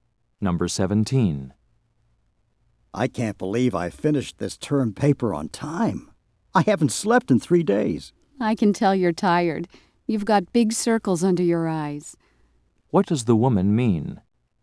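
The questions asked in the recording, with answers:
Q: What does the woman mean?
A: The man looks tired.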